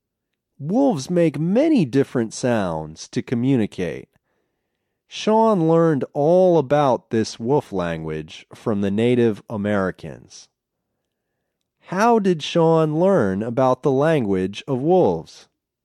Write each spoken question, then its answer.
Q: How did Sean learn about the language of wolves?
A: He learned about the wolf language from Native Americans.